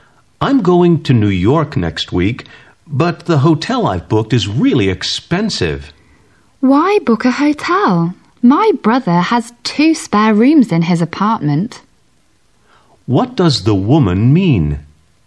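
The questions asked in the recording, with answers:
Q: What does the woman mean?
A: He could stay in her brother's apartment, which has two spare rooms, instead of a hotel.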